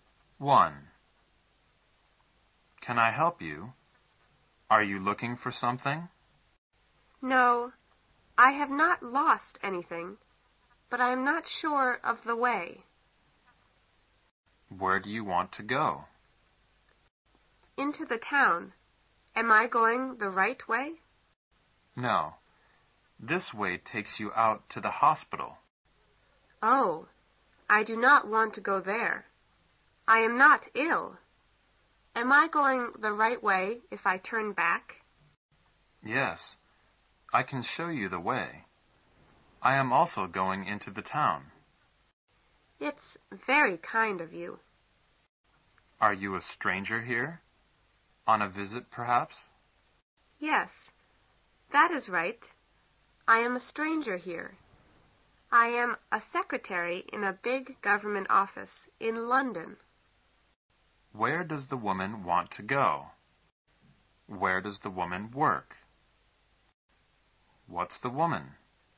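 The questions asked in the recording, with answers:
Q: Where does the woman want to go?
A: Into the town

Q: Where does the woman work?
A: In a big government office in London

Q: What's the woman?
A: A secretary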